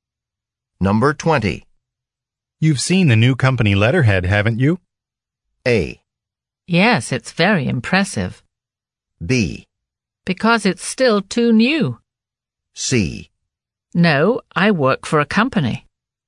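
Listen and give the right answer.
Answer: A: Yes, it's very impressive.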